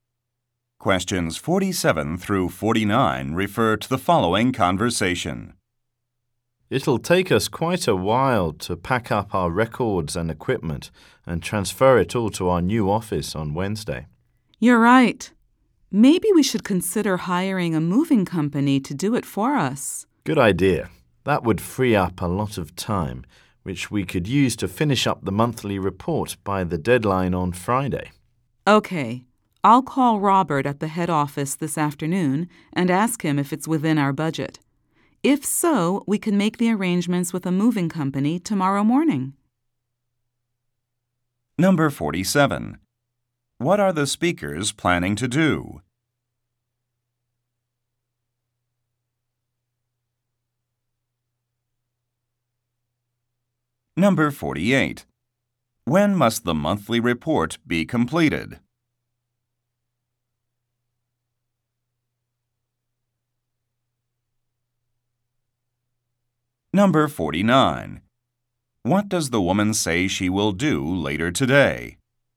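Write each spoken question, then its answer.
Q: What are the speakers planning to do?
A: Move to a new office

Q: When must the monthly report be completed?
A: By Friday

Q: What does the woman say she will do later today?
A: Call Robert at the head office about the budget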